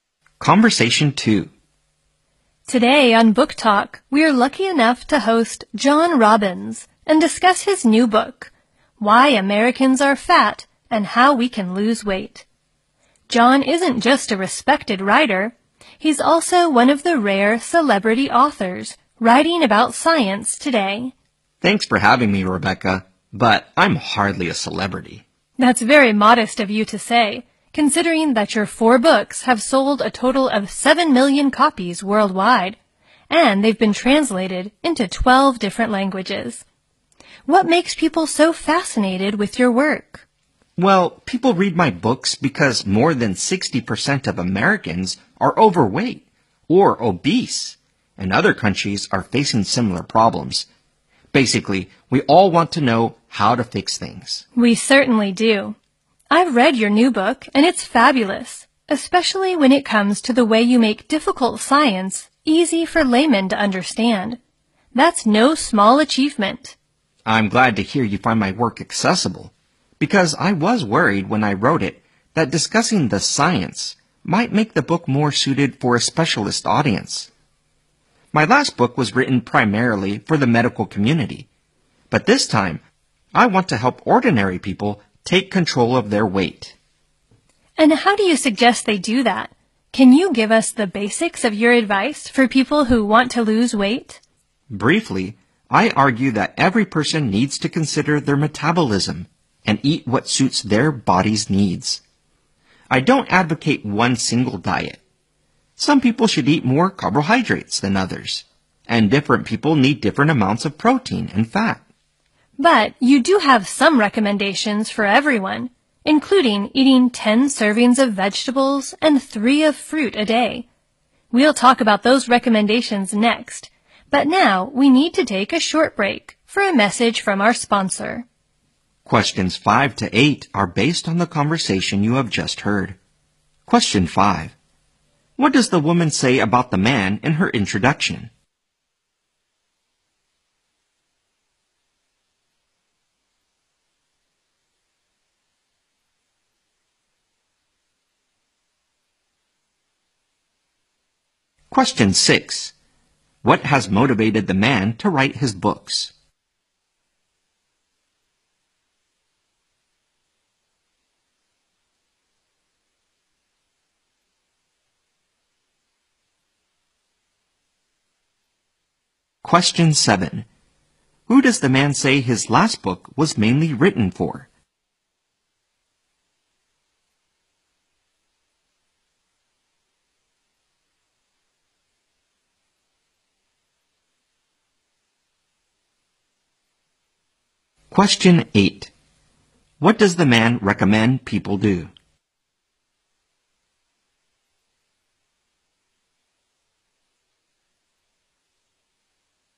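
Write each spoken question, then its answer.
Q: What does the woman say about the man in her introduction?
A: He is a respected writer and one of the rare celebrity authors writing about science.

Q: What has motivated the man to write his books?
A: Most Americans are overweight or obese, and people want to know how to fix it.

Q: Who does the man say his last book was mainly written for?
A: The medical community.

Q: What does the man recommend people do?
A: Consider their metabolism and eat what suits their body's needs.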